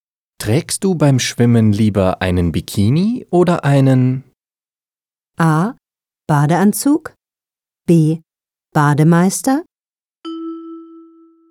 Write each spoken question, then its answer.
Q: Trägst du beim Schwimmen lieber einen Bikini oder einen?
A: A. Trägst du beim Schwimmen lieber einen Bikini oder einen Badeanzug?